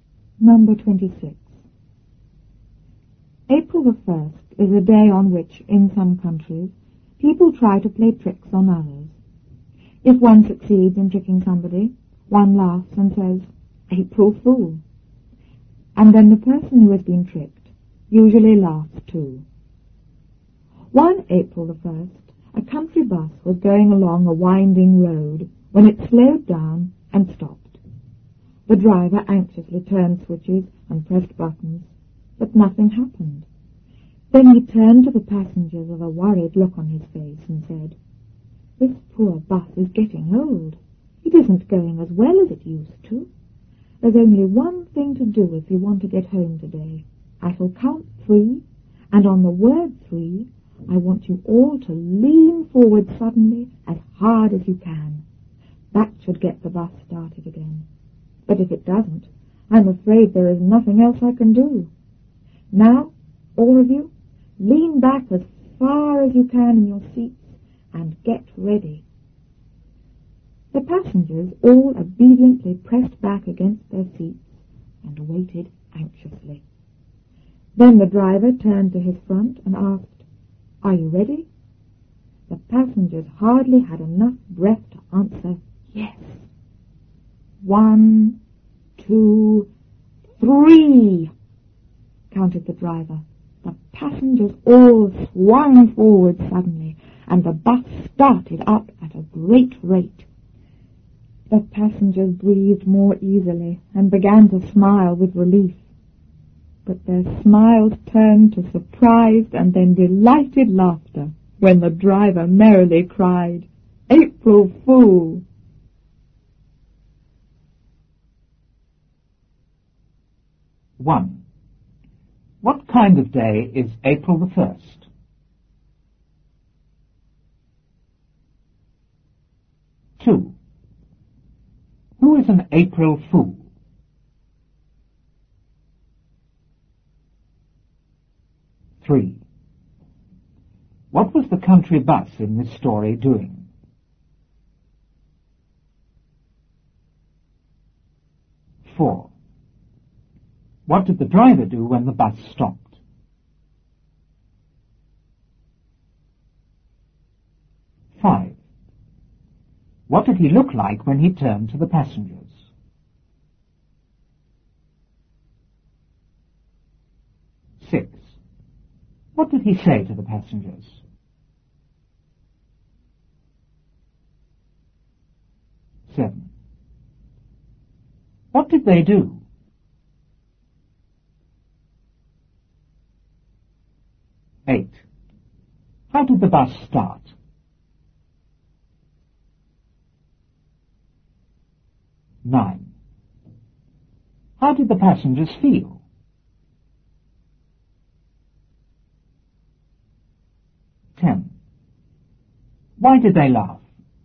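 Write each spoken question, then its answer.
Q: What kind of day is April the 1st?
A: A day on which people in some countries try to play tricks on others

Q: Who is an April Fool?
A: A person who has been tricked on April the 1st

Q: What was the country bus in this story doing?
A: Going along a winding road

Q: What did the driver do when the bus stopped?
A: He anxiously turned switches and pressed buttons

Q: What did he look like when he turned to the passengers?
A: He had a worried look on his face

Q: What did he say to the passengers?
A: The bus was old; on the count of three they must lean forward suddenly as hard as they could to get it started

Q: What did they do?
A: They pressed back against their seats, then swung forward on three

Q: How did the bus start?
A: It started up at a great rate when the passengers swung forward

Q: How did the passengers feel?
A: Anxious at first, then relieved

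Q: Why did they laugh?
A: The driver cried "April Fool!" — he had tricked them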